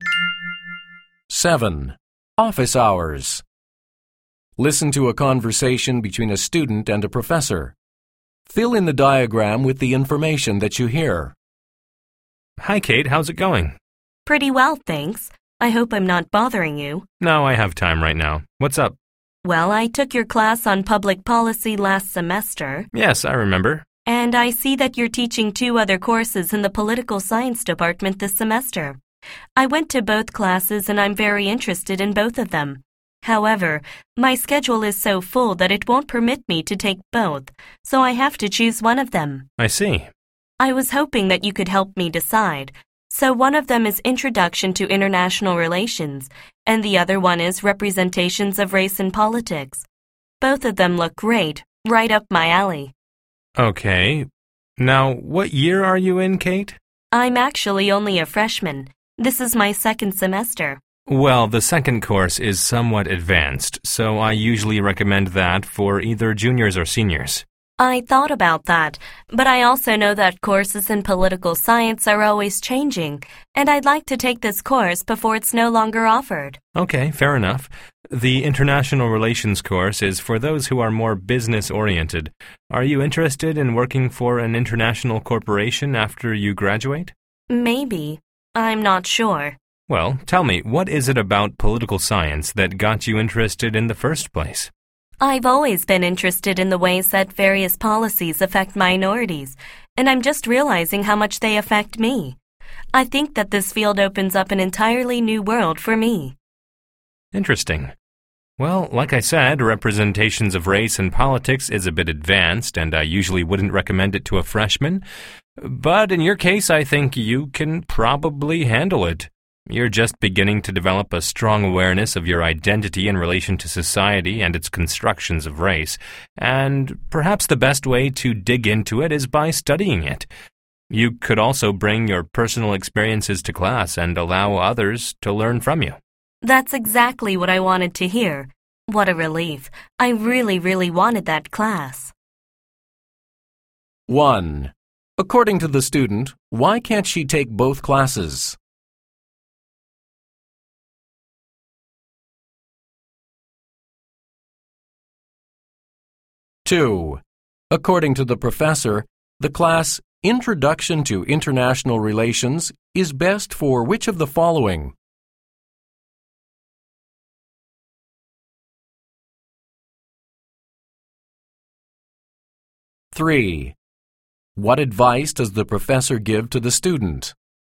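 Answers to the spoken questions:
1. Her schedule is too full
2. Business-oriented students
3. Take Representations of Race in Politics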